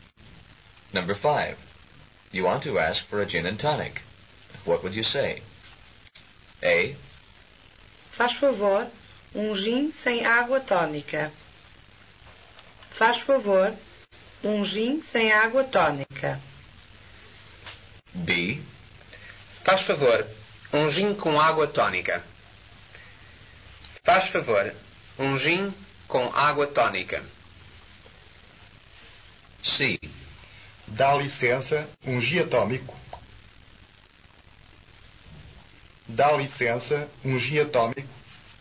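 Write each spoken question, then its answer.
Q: You want to ask for a gin and tonic.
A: B: Faz favor, gin com água tônica.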